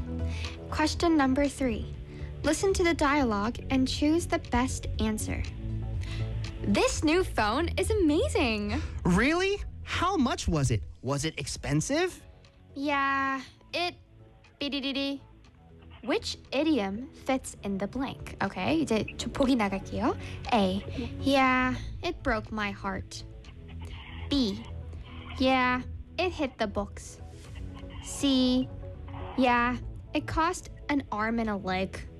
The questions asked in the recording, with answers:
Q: Which idiom fits in the blank?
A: 맞습니다.